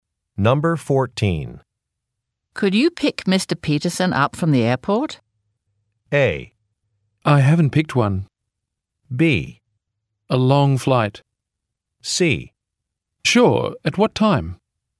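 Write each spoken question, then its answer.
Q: Could you pick Mr. Peterson up from the airport?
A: C: Sure, at what time?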